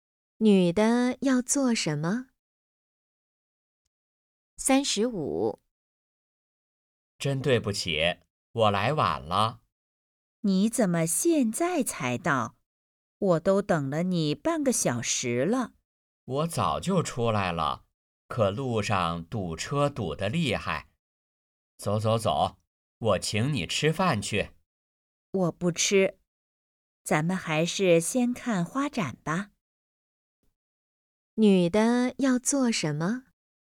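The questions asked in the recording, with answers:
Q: 女的要做什么?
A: 看花展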